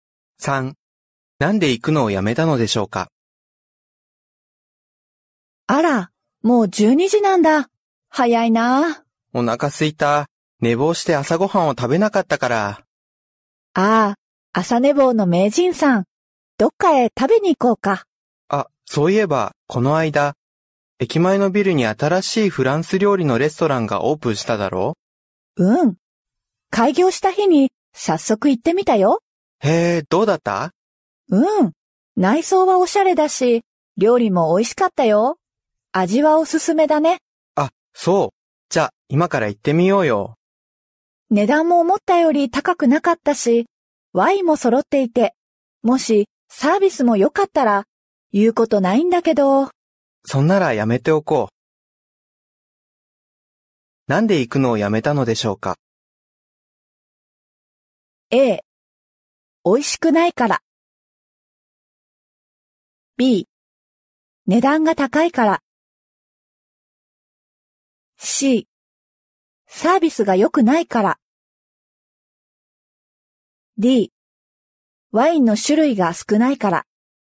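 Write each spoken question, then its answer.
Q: なんで行くのをやめたのでしょうか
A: C: サービスが良くないから。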